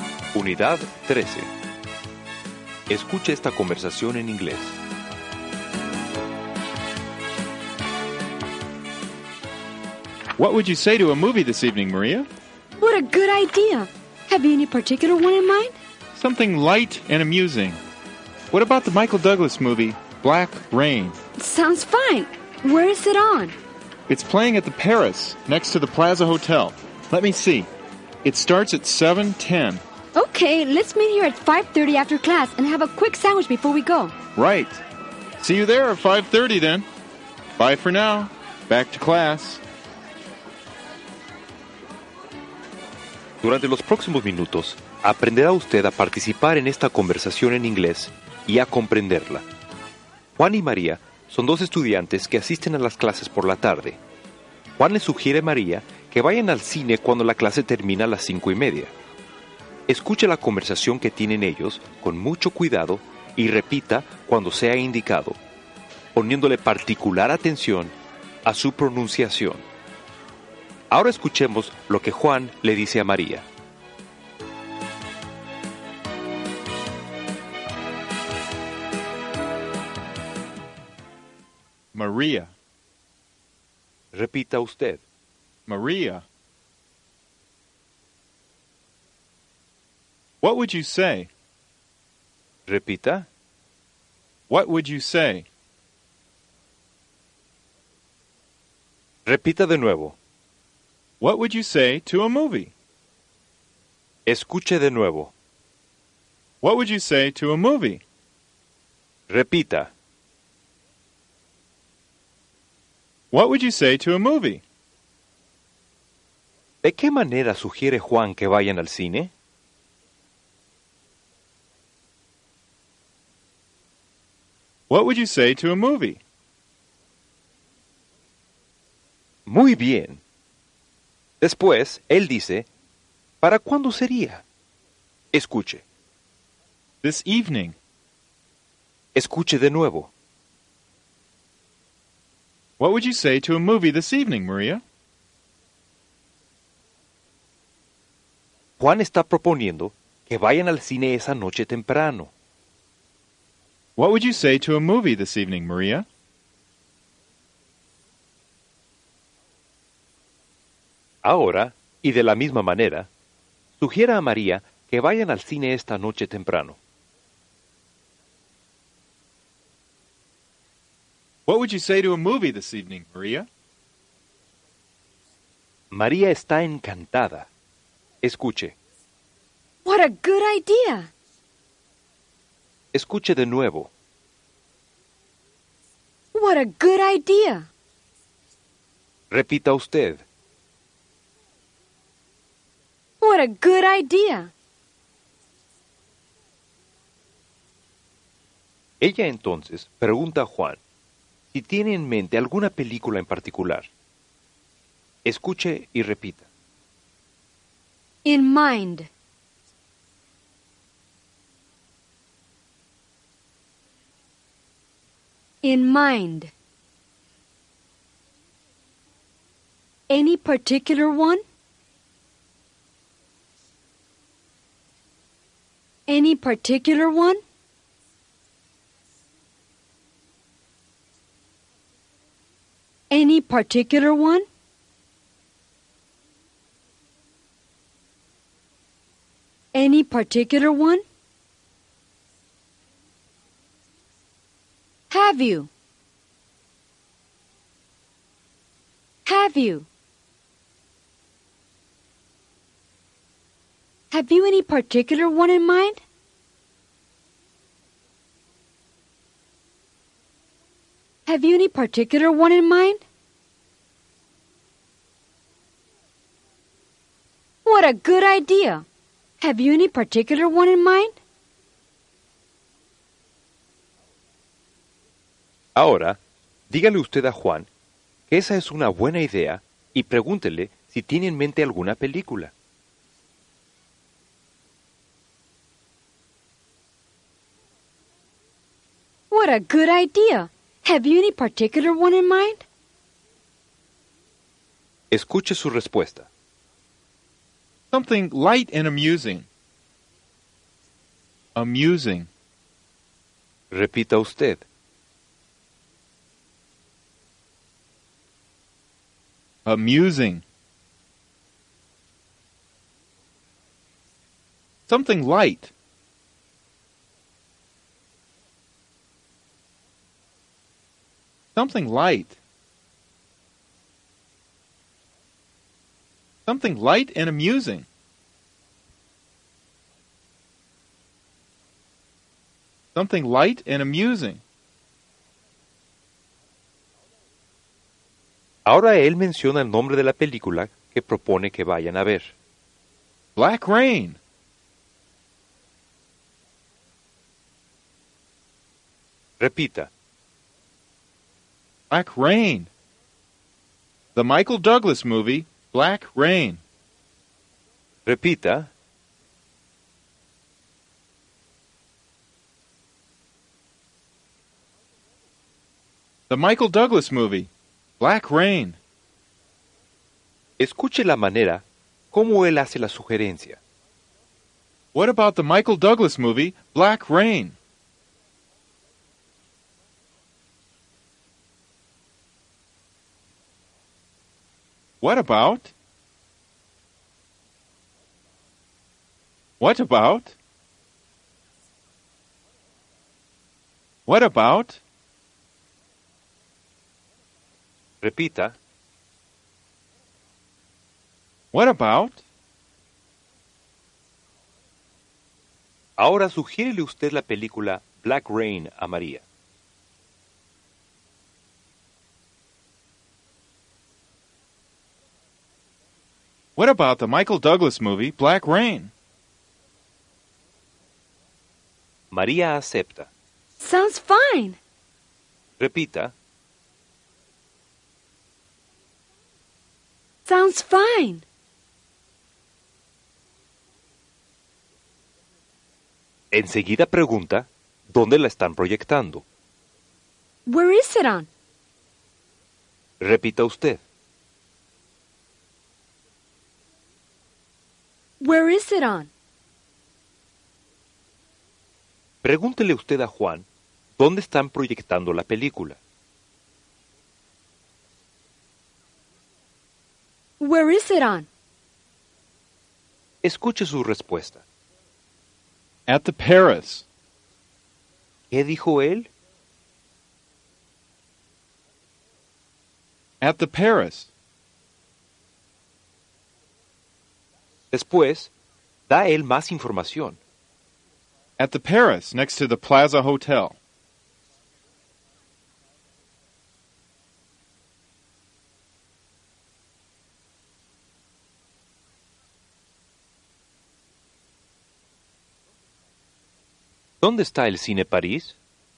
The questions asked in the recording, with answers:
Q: ¿Dónde está el Cine París?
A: Next to the Plaza Hotel.